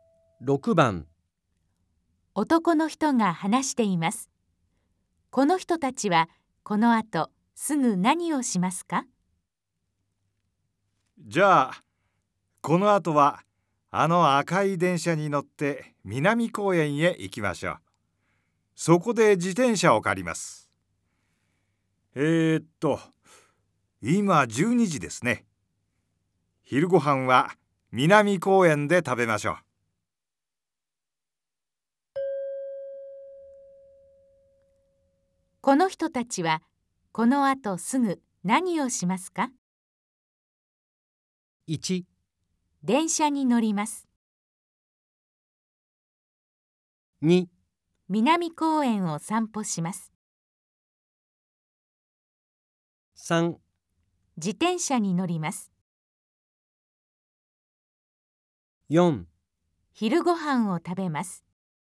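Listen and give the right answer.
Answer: 1: 電車に乗ります。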